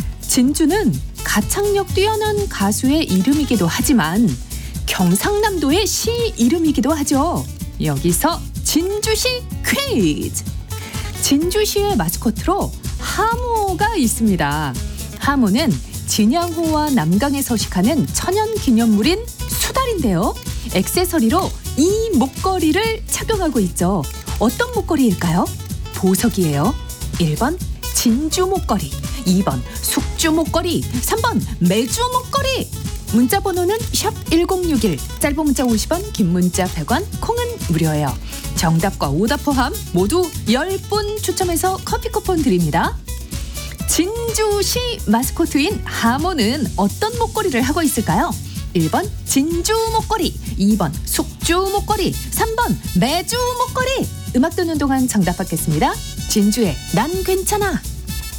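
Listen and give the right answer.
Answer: 1: 진주 목걸이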